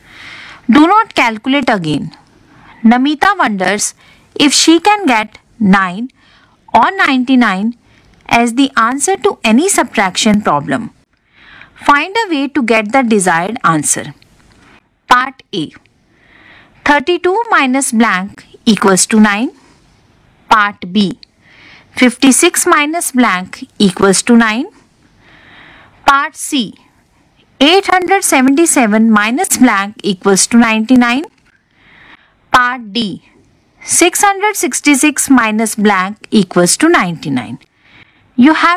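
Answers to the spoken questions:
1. 23
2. 47
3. 778
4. 567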